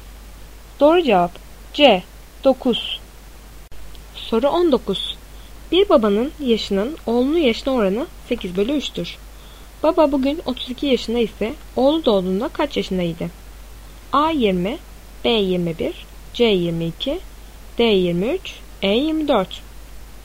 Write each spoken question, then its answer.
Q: Baba bugün 32 yaşında ise oğlu doğduğunda kaç yaşındaydı?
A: Doğru cevap A 20.